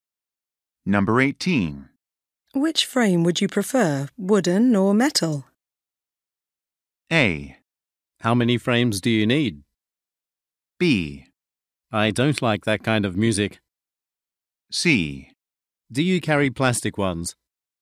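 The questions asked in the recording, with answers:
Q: Which frame would you prefer, wooden or metal?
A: C: Do you carry plastic ones?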